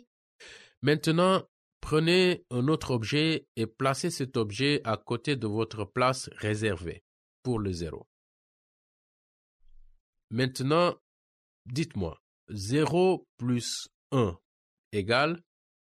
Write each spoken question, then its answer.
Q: Maintenant, dites-moi, 0 plus 1 égale?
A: 0 plus 1 égale 1.